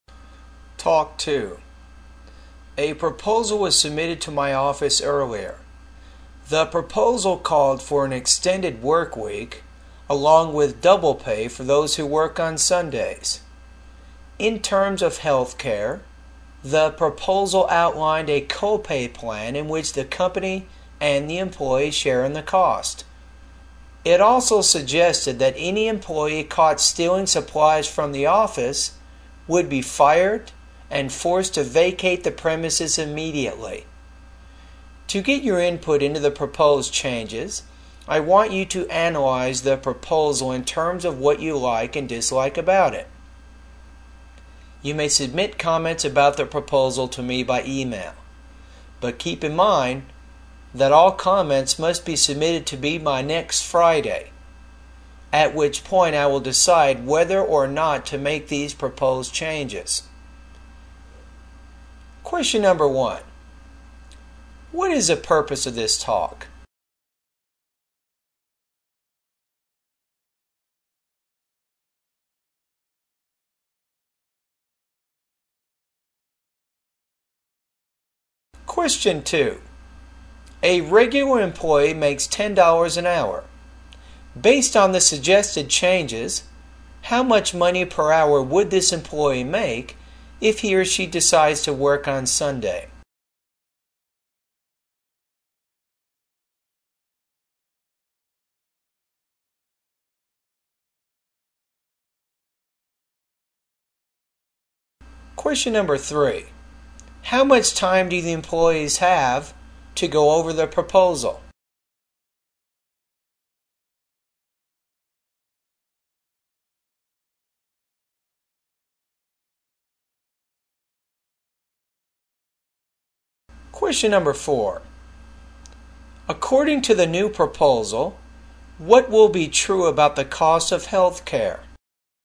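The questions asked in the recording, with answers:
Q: What is the purpose of this talk?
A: To ask employees for feedback on a proposal

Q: Based on the suggested changes, how much money per hour would this employee make if he or she decides to work on Sunday?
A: $20 an hour

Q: How much time do the employees have to go over the proposal?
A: Until next Friday

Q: According to the new proposal, what will be true about the cost of health care?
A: The company and the employee will share the cost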